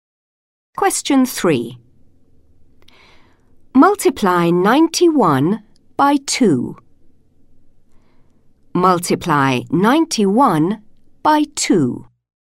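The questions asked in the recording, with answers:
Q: Multiply 91 by 2.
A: 182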